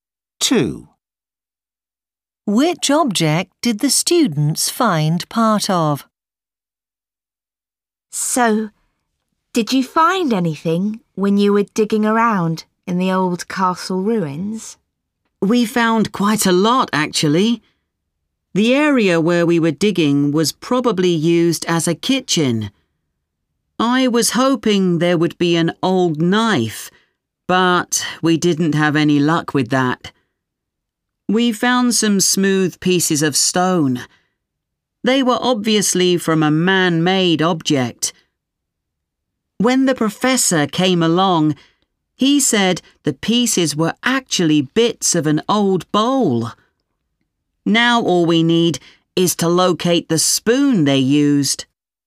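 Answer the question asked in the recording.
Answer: A bowl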